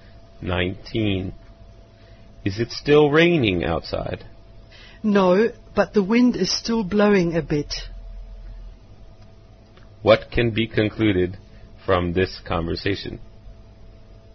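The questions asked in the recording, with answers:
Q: What can be concluded from this conversation?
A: It has stopped raining but is still windy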